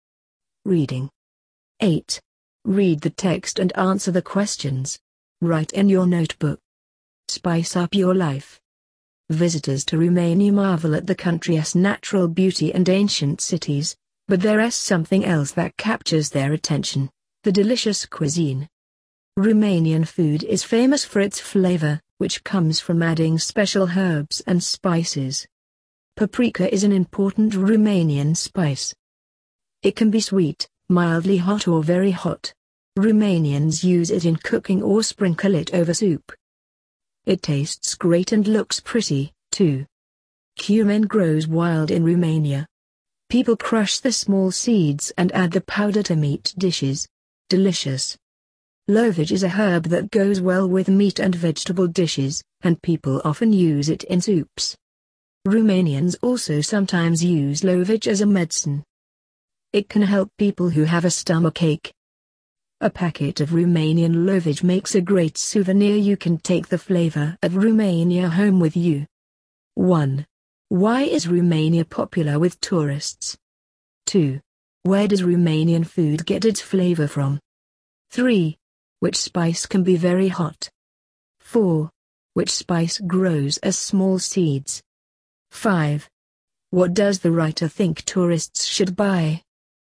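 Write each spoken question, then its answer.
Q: Why is Romania popular with tourists?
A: Its natural beauty, ancient cities and delicious cuisine

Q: Where does Romanian food get its flavor from?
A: From adding special herbs and spices

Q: Which spice can be very hot?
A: Paprika

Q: Which spice grows as small seeds?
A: Cumin

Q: What does the writer think tourists should buy?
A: A packet of Romanian lovage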